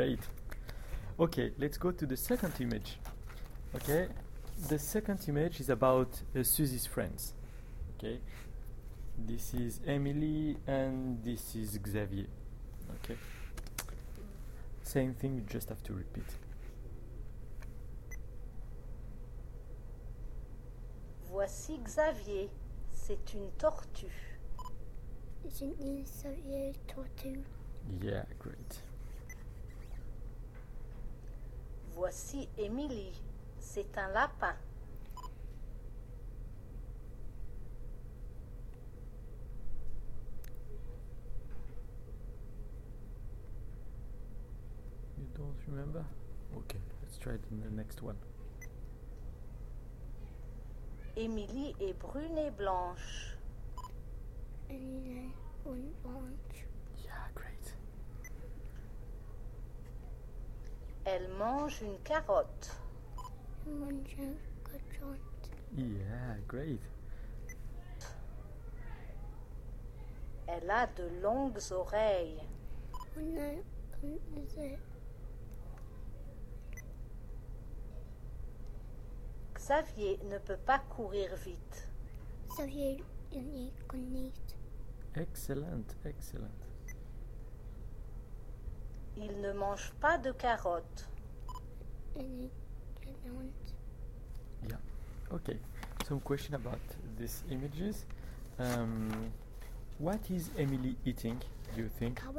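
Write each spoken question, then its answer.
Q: What is Emily eating, do you think?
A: A carrot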